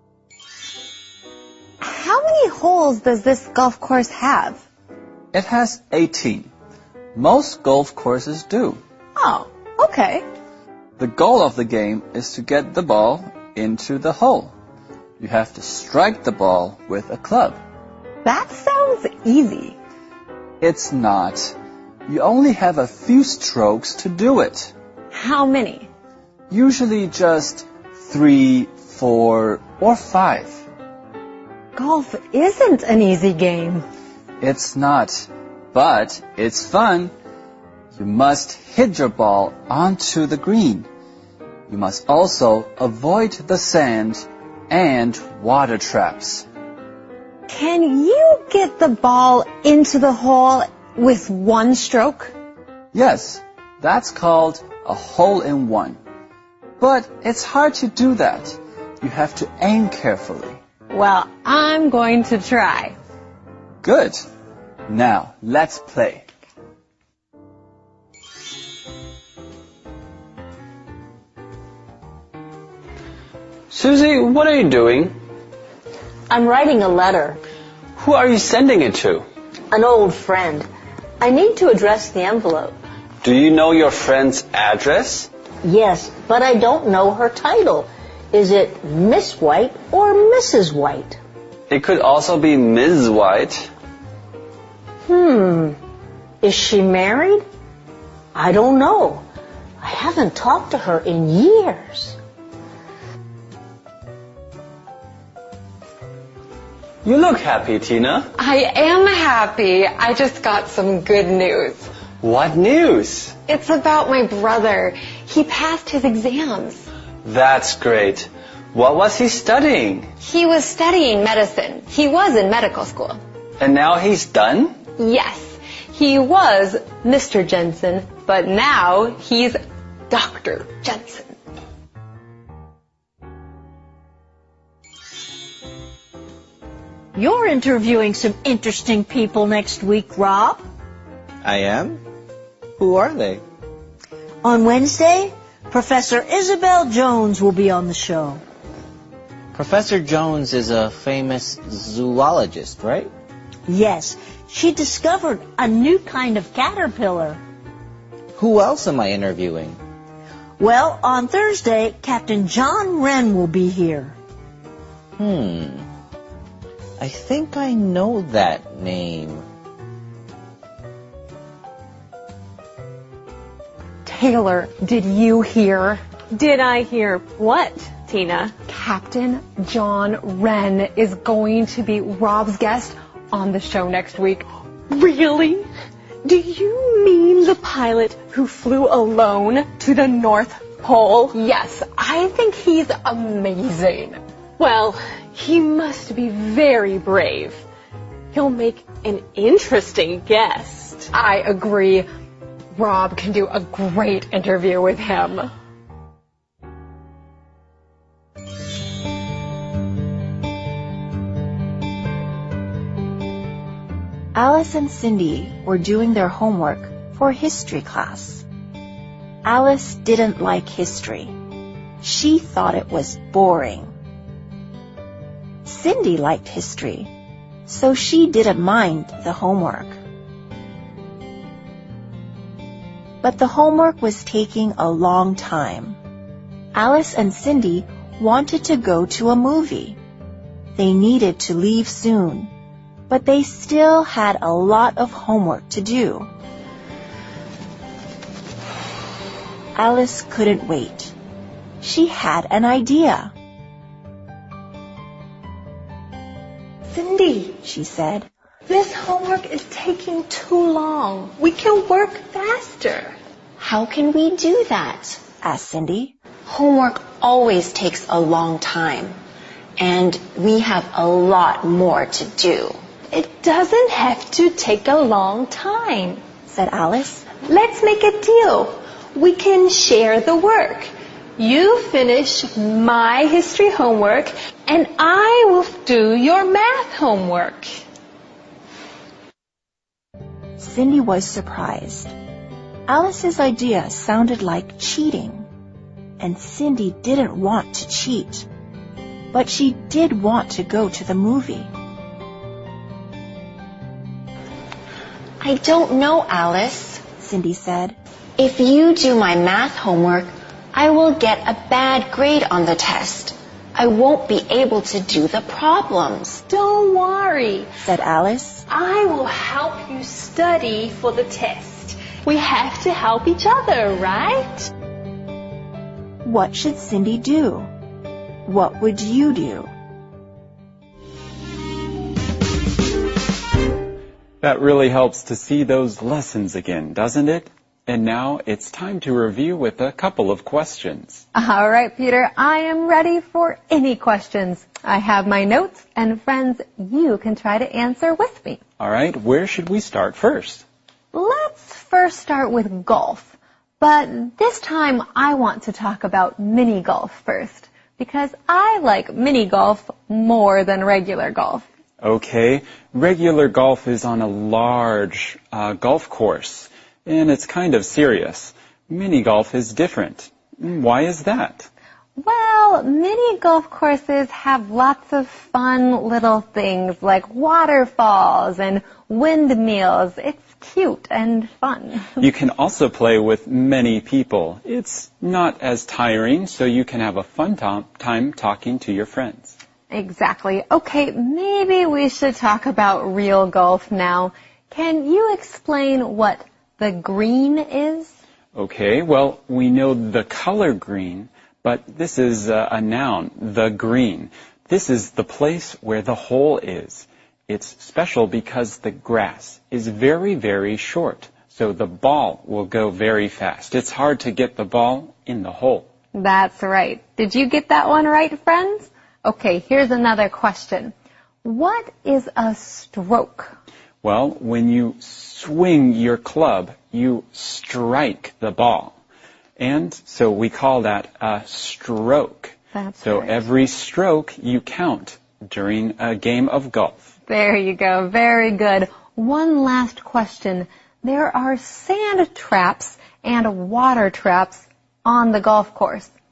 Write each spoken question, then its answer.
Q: Can you explain what the green is?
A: This is the place where the hole is.

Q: What is a stroke?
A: Well, when you swing your club, you strike the ball.